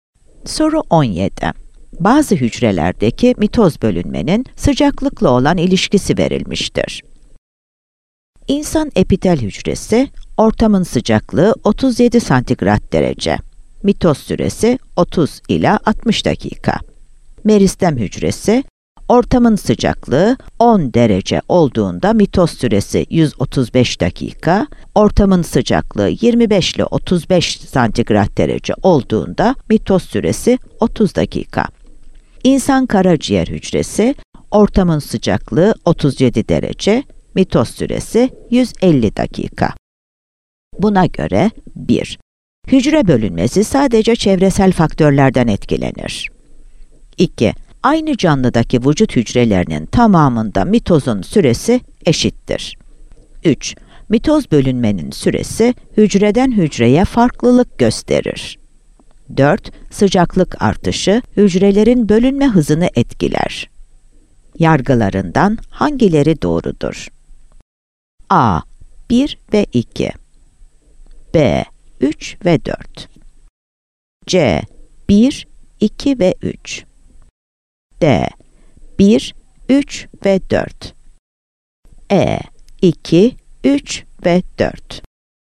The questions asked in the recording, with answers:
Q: Yargılarından hangileri doğrudur?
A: Yanıt B. 3 ve 4'tür.